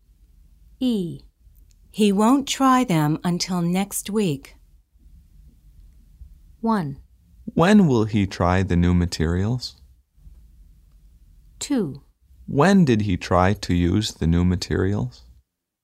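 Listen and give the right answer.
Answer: 1: When will he try the new materials?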